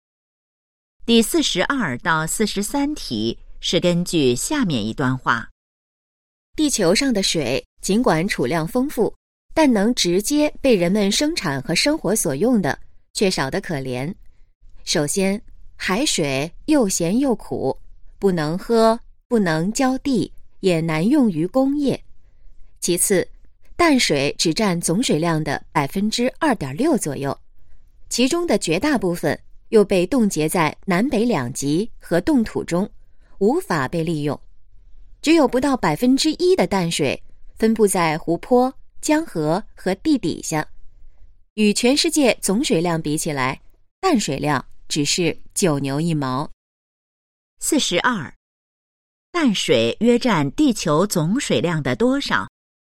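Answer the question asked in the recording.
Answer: 2.6%左右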